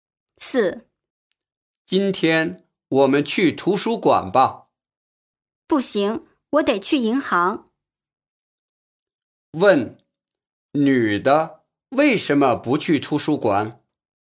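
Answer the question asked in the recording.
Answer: 她得去银行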